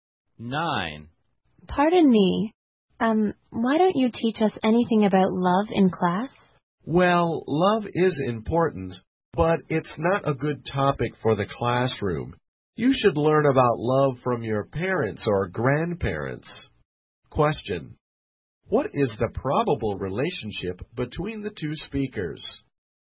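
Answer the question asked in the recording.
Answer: Student and teacher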